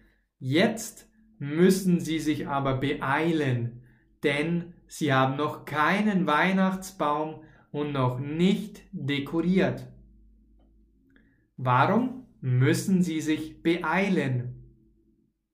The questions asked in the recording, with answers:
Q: Warum müssen Sie sich beeilen?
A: Weil Sie noch keinen Weihnachtsbaum haben.